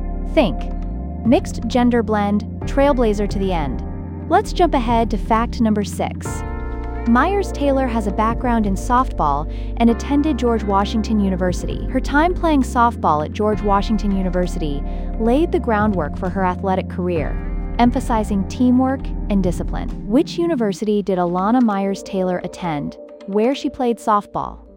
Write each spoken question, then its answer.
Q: Which university did Alana Myers Taylor attend where she played softball?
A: Correct answer, George Washington University.